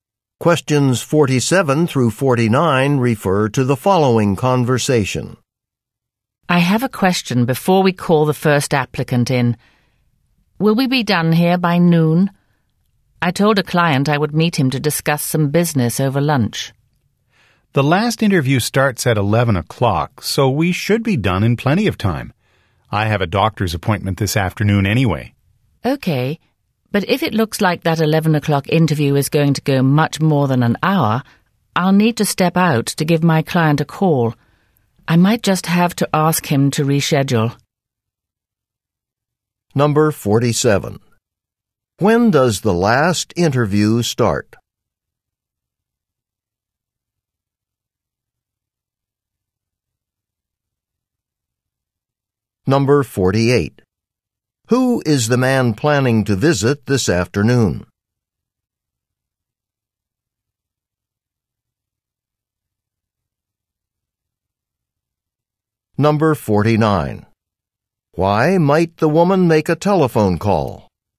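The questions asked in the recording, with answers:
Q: When does the last interview start?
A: At 11 o'clock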